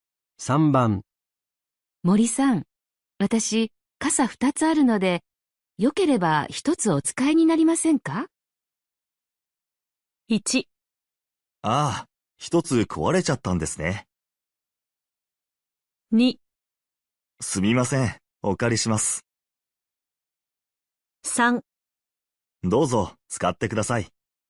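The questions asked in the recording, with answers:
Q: 森さん、私、傘2つあるので、よければ1つお使いになりませんか?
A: 2: すみません、お借りします。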